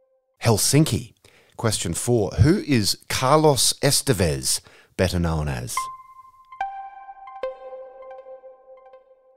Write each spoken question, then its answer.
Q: Who is Carlos Estevez, better known as?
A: Charlie Sheen.